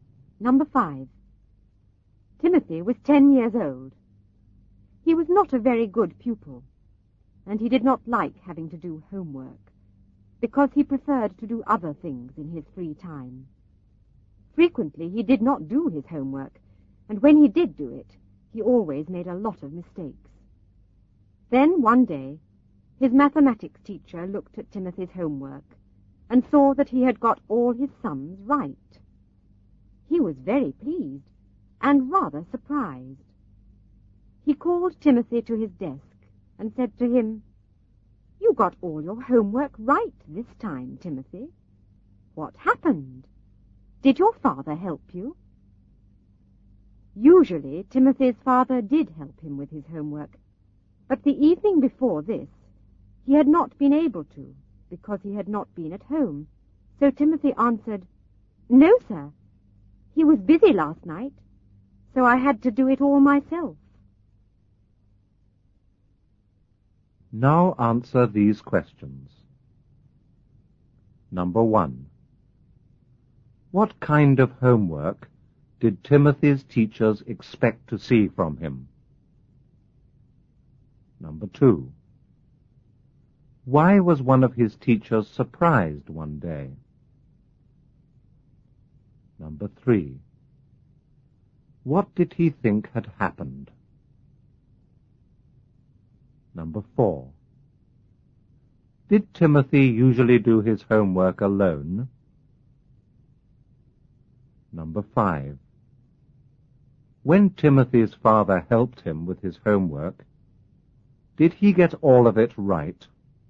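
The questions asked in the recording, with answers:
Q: What kind of homework did Timothy's teachers expect to see from him?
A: Homework with a lot of mistakes (or none at all)

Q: Why was one of his teachers surprised one day?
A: Because Timothy got all his sums right

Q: What did he think had happened?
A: He thought Timothy's father had helped him

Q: Did Timothy usually do his homework alone?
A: No, his father usually helped him

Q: When Timothy's father helped him with his homework, did he get all of it right?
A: No, he made a lot of mistakes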